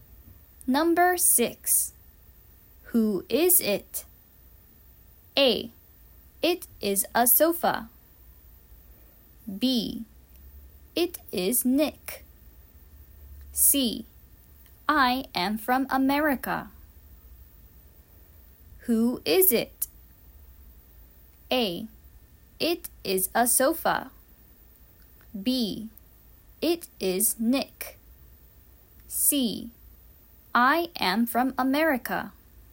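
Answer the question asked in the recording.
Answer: B: It is Nick.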